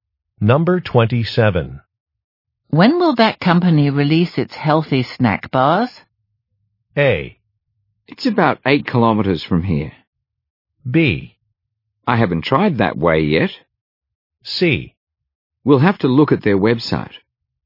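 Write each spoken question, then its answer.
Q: When will that company release its healthy snack bars?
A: C: We'll have to look at their website.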